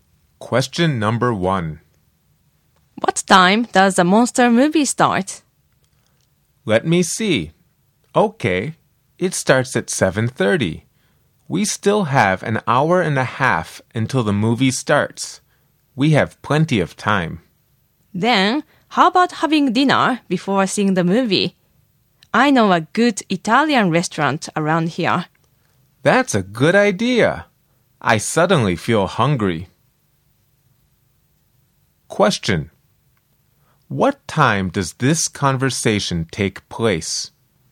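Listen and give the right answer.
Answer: 6:00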